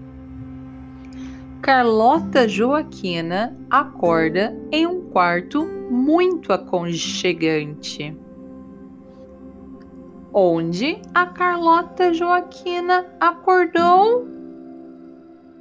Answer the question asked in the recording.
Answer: Em um quarto muito aconchegante, a Carlota Joaquina acordou em um quarto muito aconchegante.